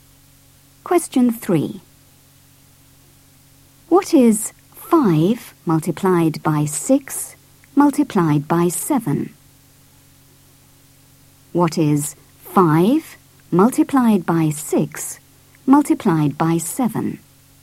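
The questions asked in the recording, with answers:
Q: 5 multiplied by 6 multiplied by 7?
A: 210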